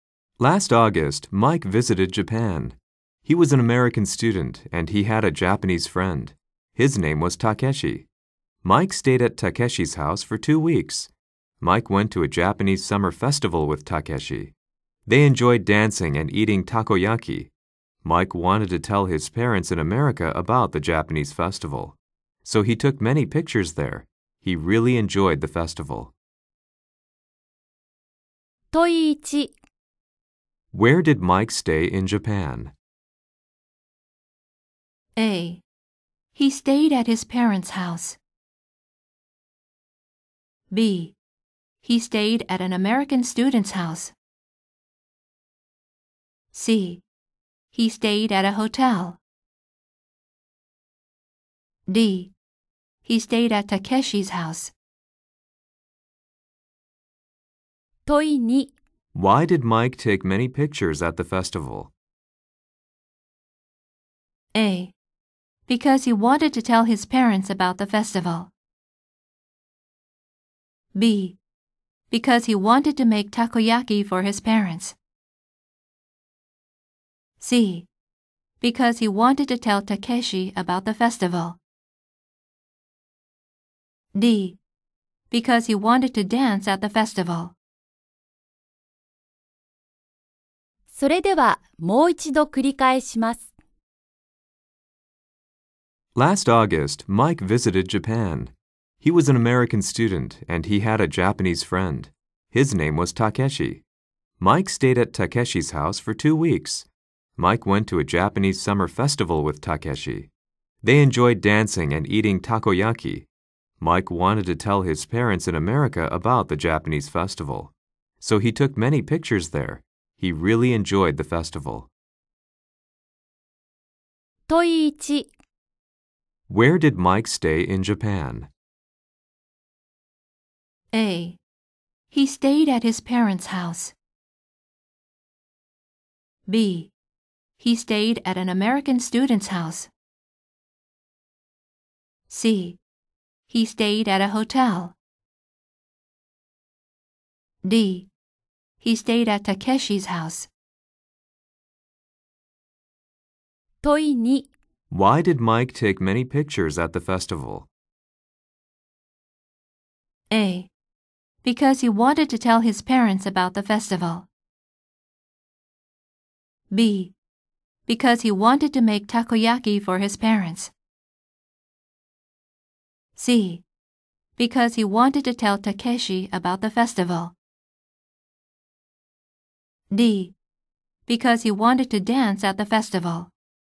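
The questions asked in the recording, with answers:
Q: Where did Mike stay in Japan?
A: D: He stayed at Takeshi's house.

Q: Why did Mike take many pictures at the festival?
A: A: Because he wanted to tell his parents about the festival.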